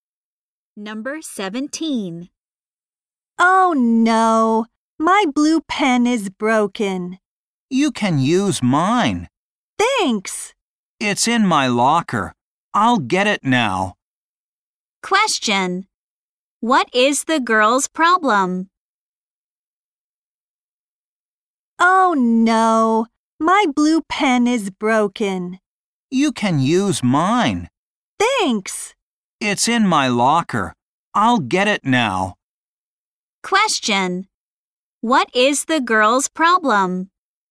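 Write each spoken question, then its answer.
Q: Question. What is the girl's problem?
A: Her blue pen is broken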